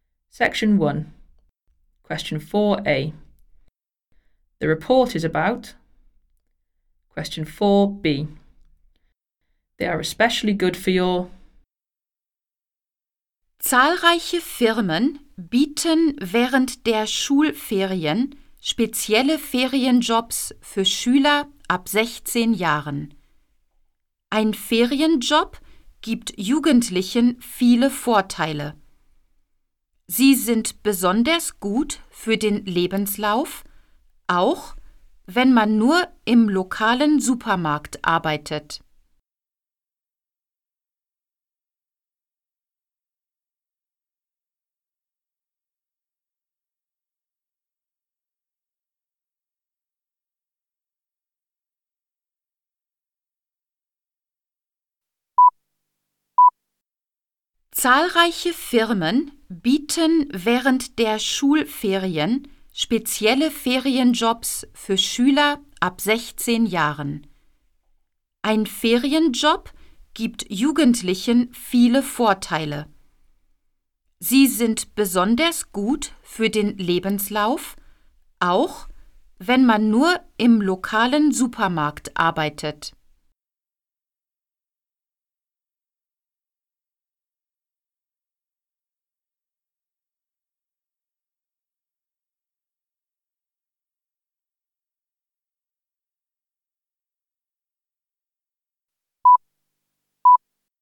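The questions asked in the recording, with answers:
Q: The report is about.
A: holiday jobs for school students

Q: They are especially good for your.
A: CV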